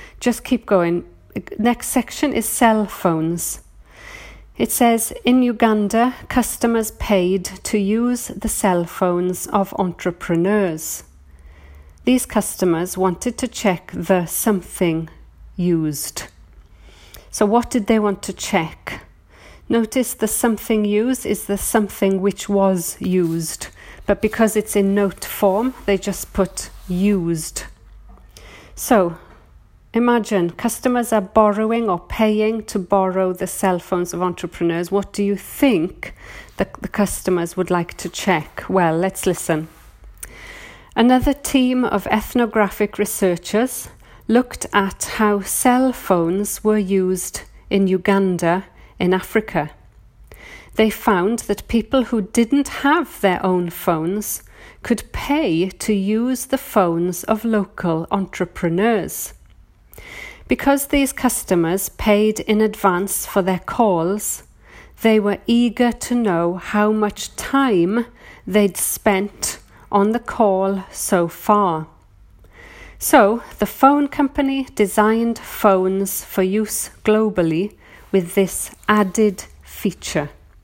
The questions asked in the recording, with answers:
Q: These customers wanted to check the something used.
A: So the answer is they wanted to check the time used.